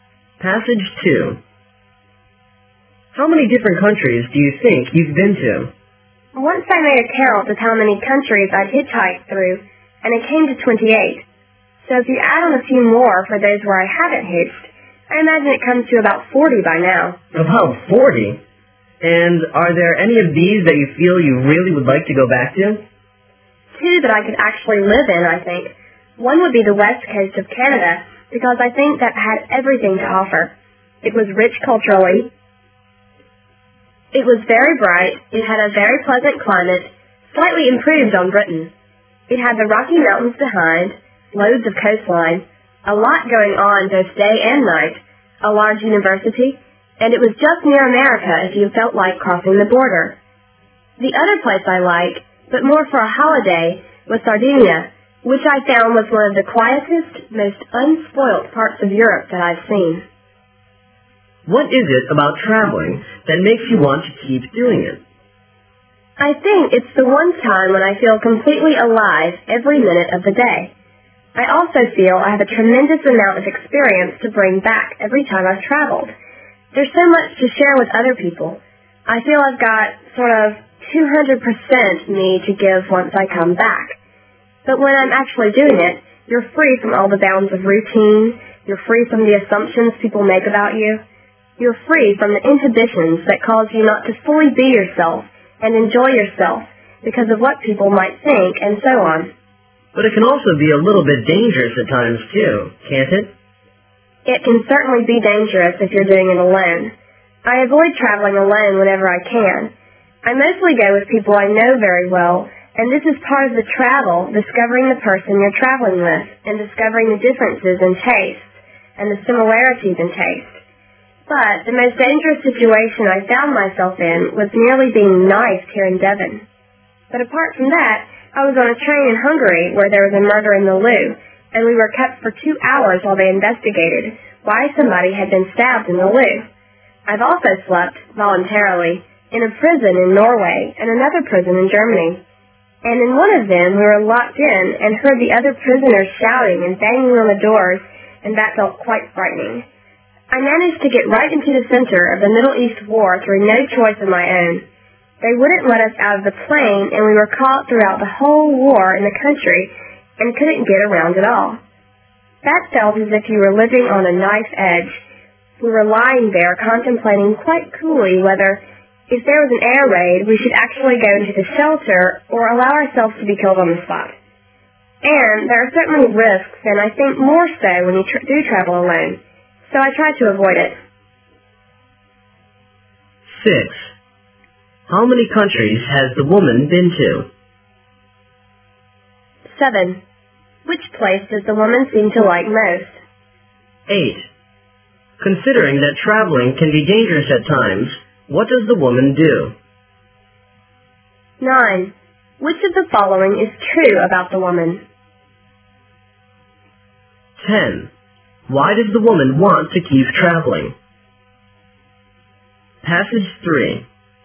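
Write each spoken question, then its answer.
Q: How many countries has the woman been to?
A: About 40

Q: Which place does the woman seem to like most?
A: The west coast of Canada

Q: Considering that traveling can be dangerous at times, what does the woman do?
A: She avoids traveling alone

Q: Why does the woman want to keep traveling?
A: She feels completely alive and free from routine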